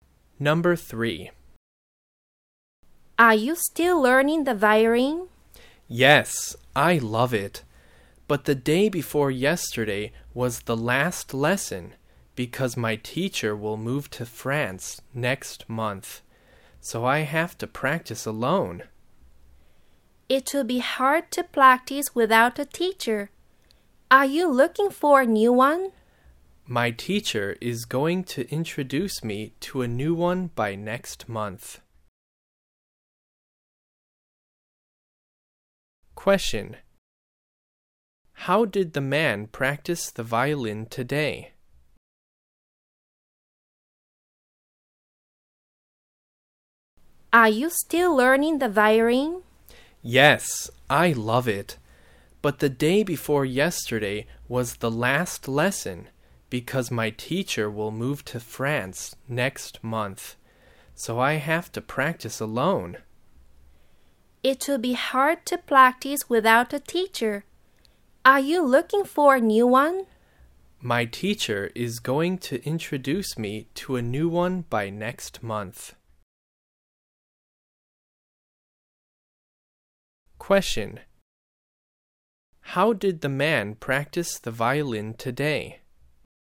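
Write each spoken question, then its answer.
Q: How did the man practice the violin today?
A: Alone, without a teacher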